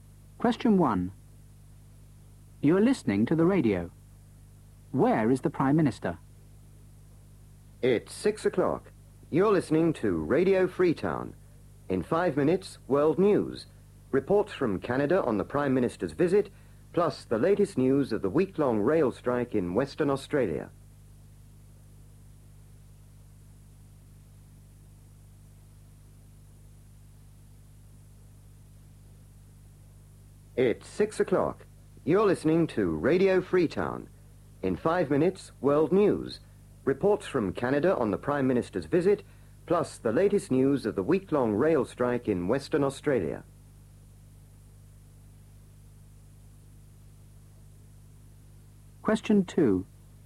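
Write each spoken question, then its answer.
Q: Where is the Prime Minister?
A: In Canada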